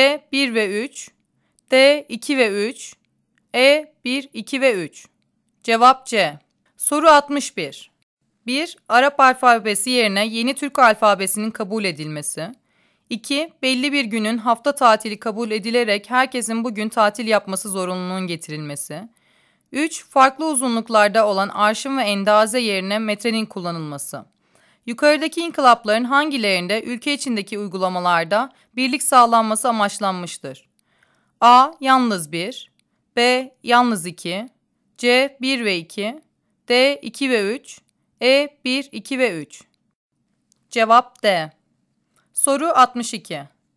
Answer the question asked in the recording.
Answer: Cevap D.